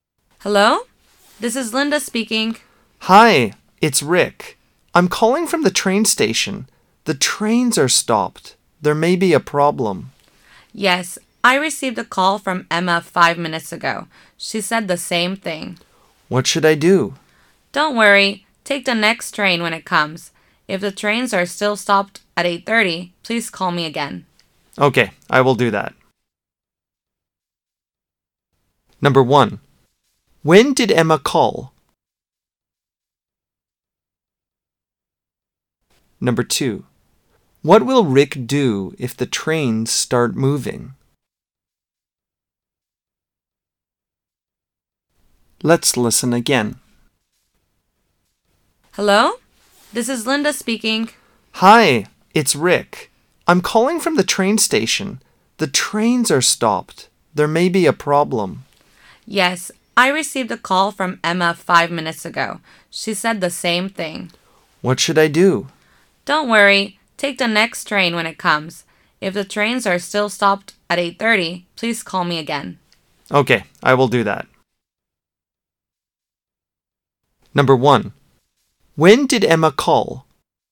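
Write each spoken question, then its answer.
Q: When did Emma call?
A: 5 minutes ago

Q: What will Rick do if the trains start moving?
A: Take the next train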